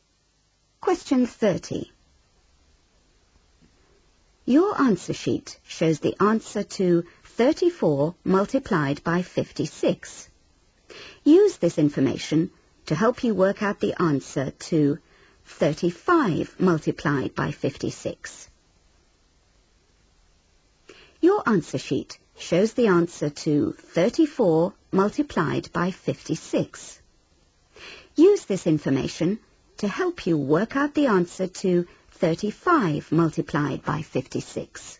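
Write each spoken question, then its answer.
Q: Use this information to help you work out the answer to 35 multiplied by 56.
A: 1960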